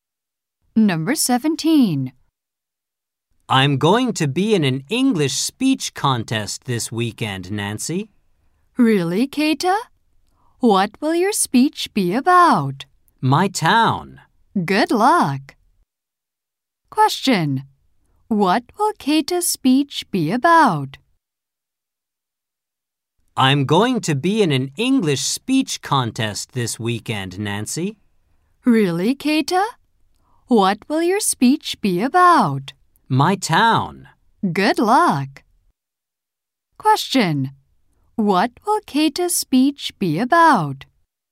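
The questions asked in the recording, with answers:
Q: What will Keita's speech be about?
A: His town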